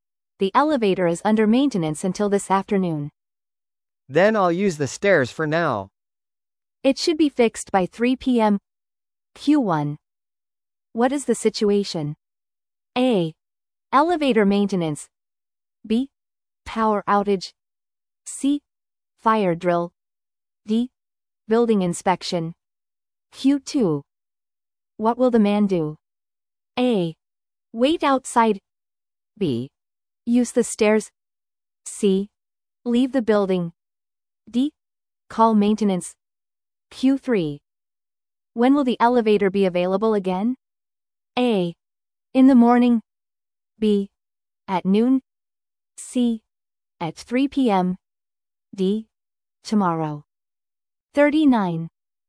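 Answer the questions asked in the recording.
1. A: Elevator maintenance.
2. B: Use the stairs.
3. C: At 3 p.m.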